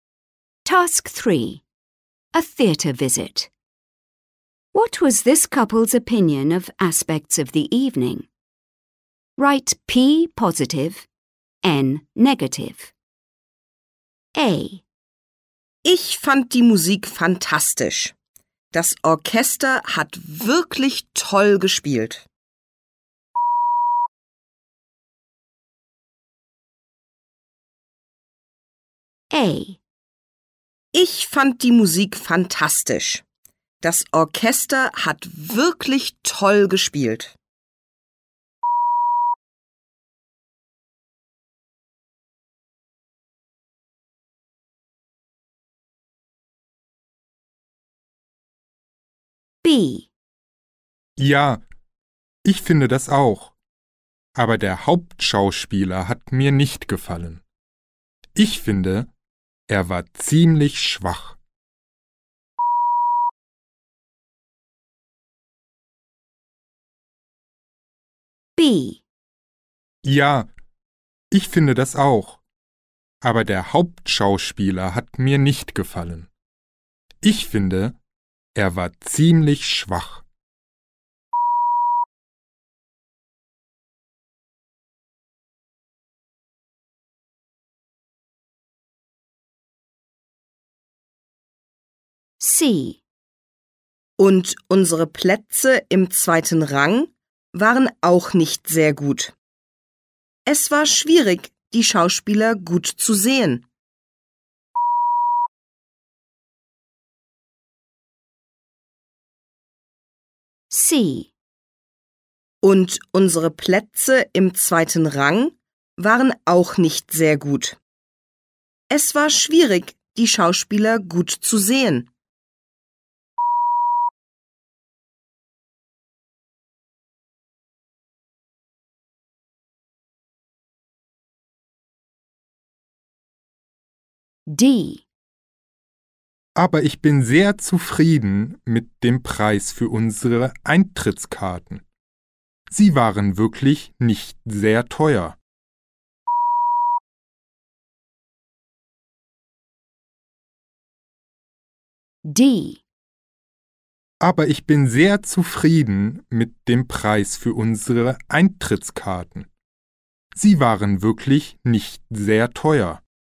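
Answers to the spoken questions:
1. P (positive): the music
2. N (negative): the main actor
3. N (negative): the seats
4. P (positive): the ticket price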